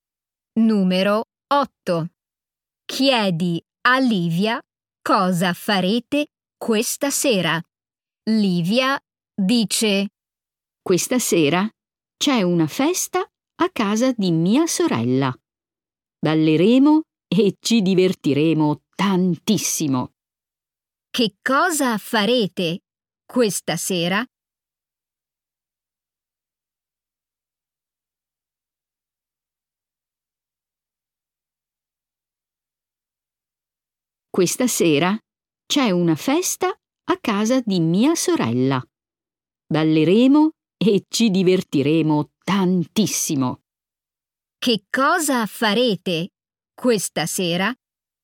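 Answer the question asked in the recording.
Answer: Andrete a una festa a casa della sorella di Livia e ballerete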